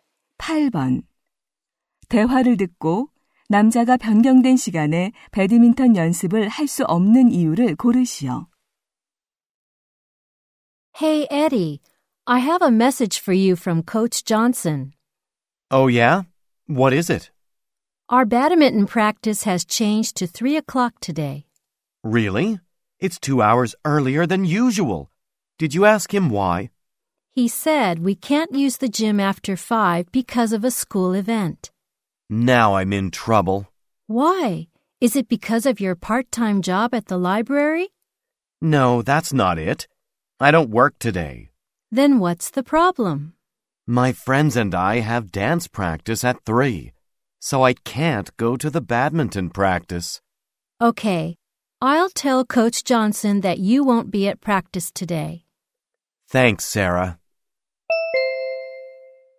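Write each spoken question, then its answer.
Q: 대화를 듣고 남자가 변경된 시간에 배드민턴 연습을 할 수 없는 이유를 고르시오.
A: 친구들과 춤 연습이 있어서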